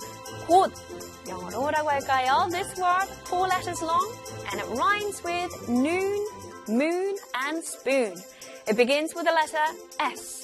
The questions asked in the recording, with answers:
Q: 곧, 영어로 뭐라고 할까요?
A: 곧, 영어로는 S-W-N, soon.